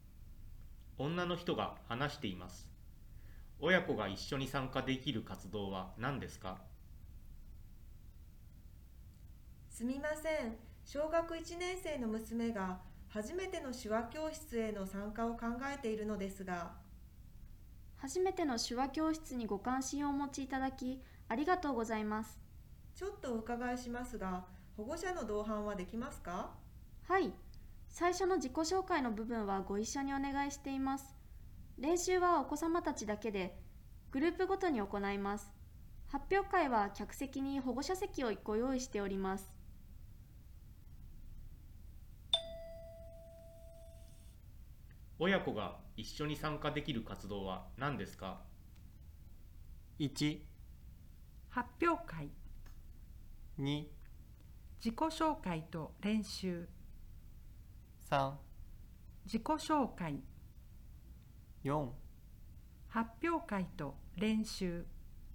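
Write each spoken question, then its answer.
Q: 親子が一緒に参加できる活動は何ですか?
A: 3: 自己紹介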